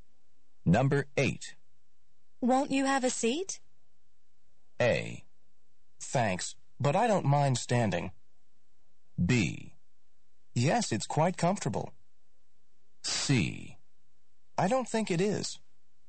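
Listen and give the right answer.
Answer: A: Thanks, but I don't mind standing.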